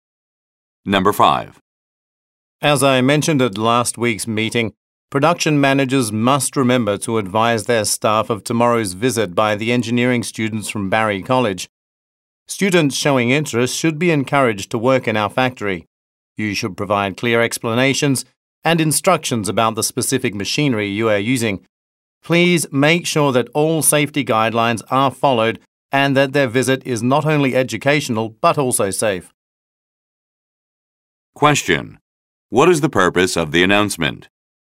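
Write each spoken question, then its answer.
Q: What is the purpose of the announcement?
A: To remind production managers to prepare staff for the engineering students' visit tomorrow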